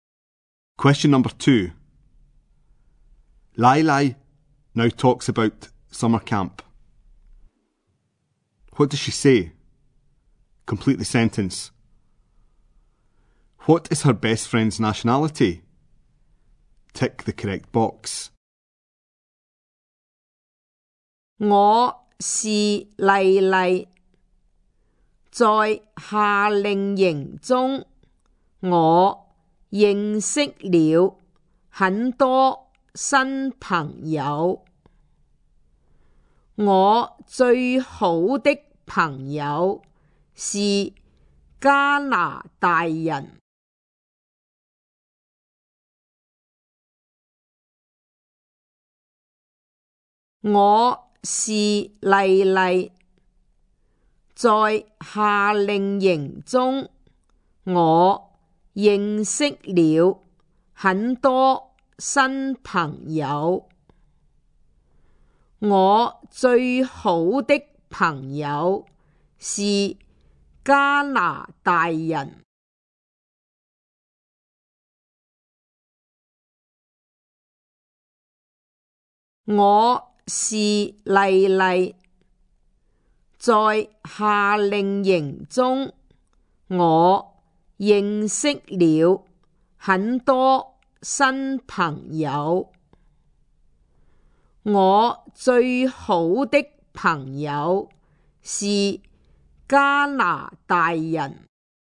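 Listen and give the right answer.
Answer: Canadian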